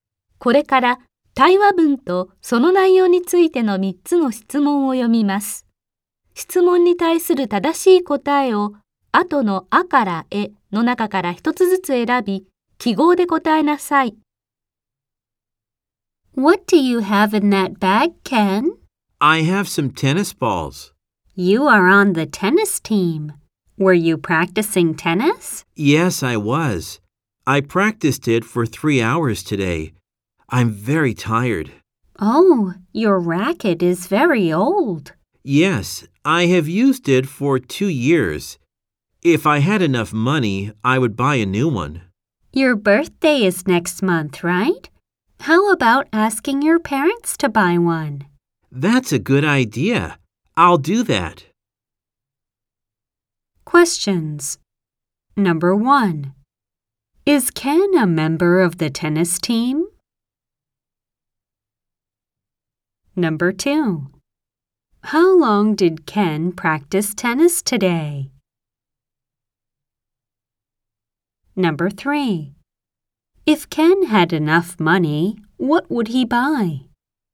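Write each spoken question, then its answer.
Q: Is Ken a member of the tennis team?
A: Yes, he is.

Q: How long did Ken practice tennis today?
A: For 3 hours.

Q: If Ken had enough money, what would he buy?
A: A new racket.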